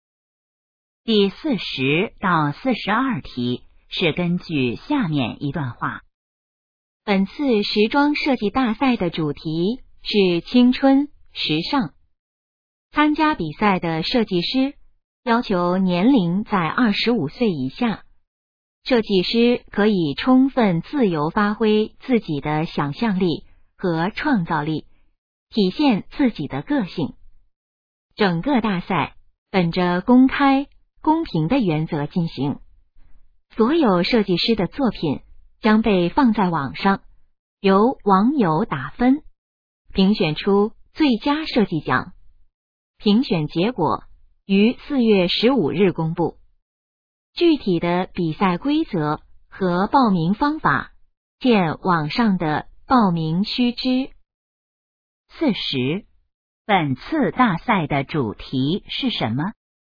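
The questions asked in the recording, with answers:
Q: 本次大赛的主题是什么?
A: 青春时尚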